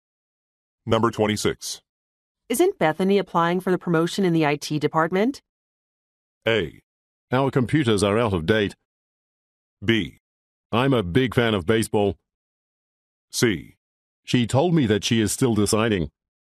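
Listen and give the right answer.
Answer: C: She told me that she is still deciding.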